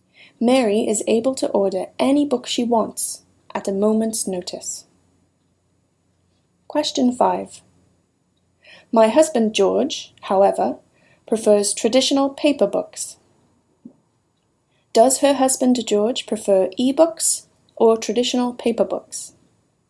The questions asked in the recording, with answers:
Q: Does her husband George prefer e-books or traditional paper books?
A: He prefers traditional paper books.